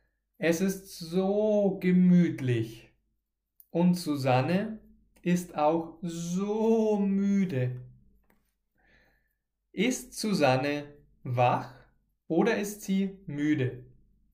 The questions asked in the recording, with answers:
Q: Ist Susanne wach oder ist sie müde?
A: Sie ist müde. Sie ist so müde.